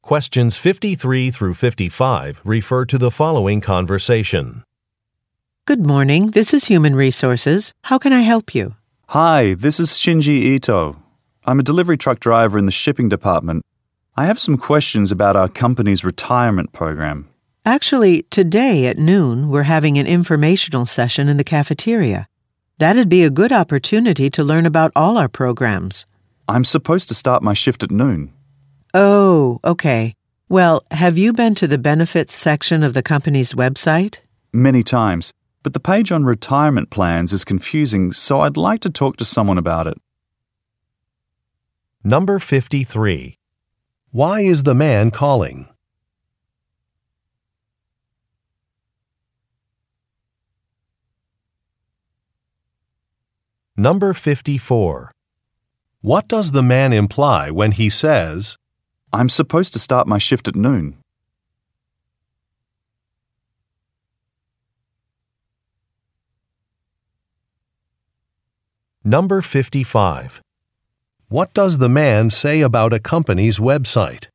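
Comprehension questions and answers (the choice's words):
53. Why is the man calling?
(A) To complain about a delay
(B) To interview for a job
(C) To ask about a company program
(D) To confirm a management decision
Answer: To ask about a company program

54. What does the man imply when he says, "I'm supposed to start my shift at noon"?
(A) He cannot attend an event.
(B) He wants to end a conversation.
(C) He needs some supplies immediately.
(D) He was given the wrong assignment.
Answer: He cannot attend an event.

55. What does the man say about a company's Web site?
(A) It is under construction.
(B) It has a useful map.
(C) A password is required to view it.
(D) Some information on it is unclear.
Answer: Some information on it is unclear.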